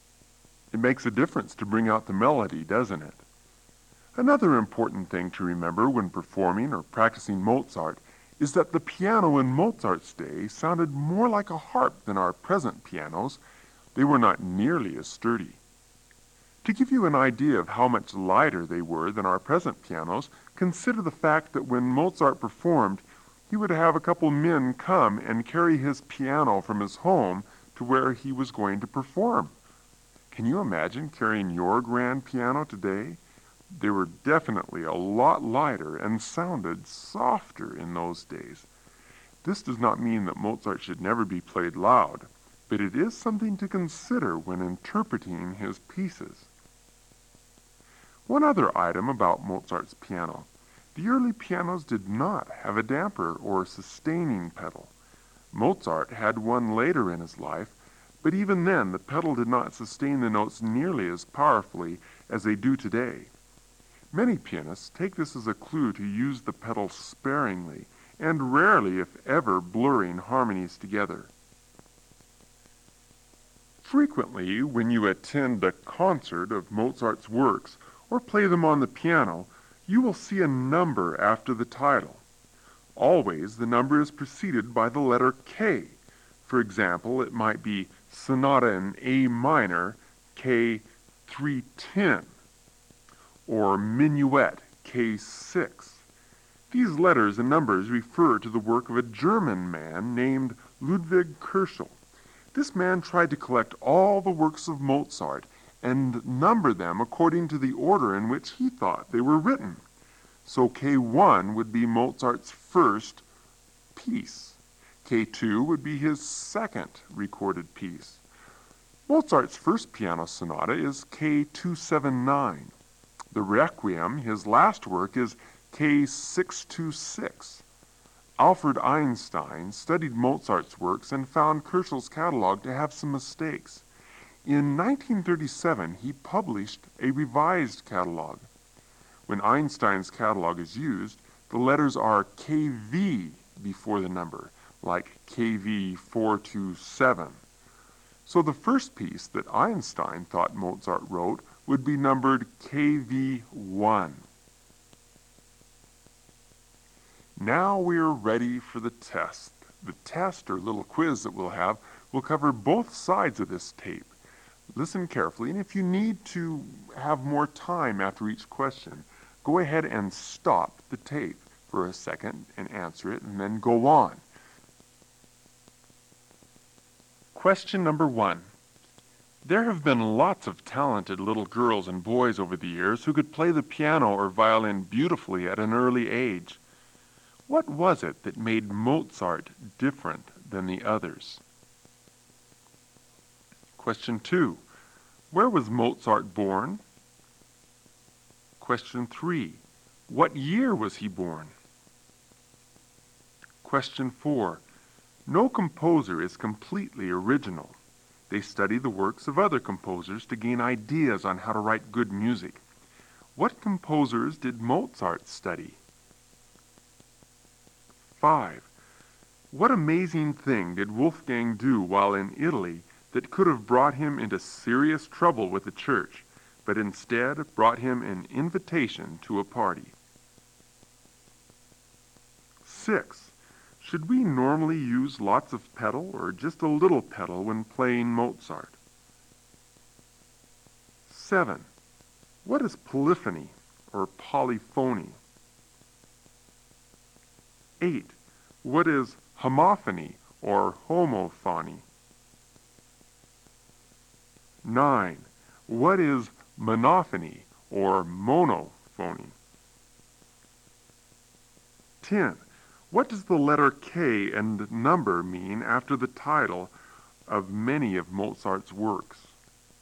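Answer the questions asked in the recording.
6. Just a little pedal
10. Kirchhoff's catalog number, ordering Mozart's works by when they were thought to be written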